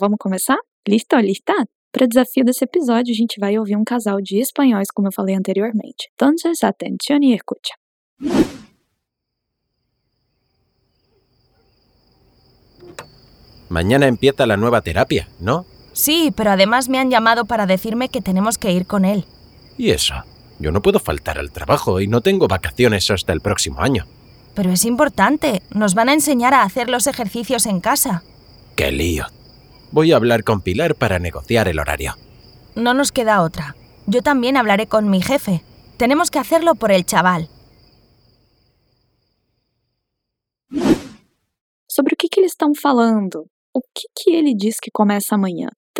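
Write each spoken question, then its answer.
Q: Sobre o que eles estão falando?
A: Sobre a nova terapia do filho, que exige que eles acompanhem o filho e ajustem seus horários de trabalho

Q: O que ele diz que começa amanhã?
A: A nova terapia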